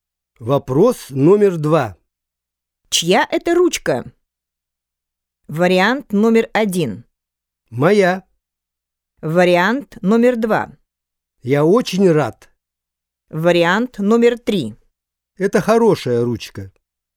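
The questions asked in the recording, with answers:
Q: Чья это ручка?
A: 1: Моя.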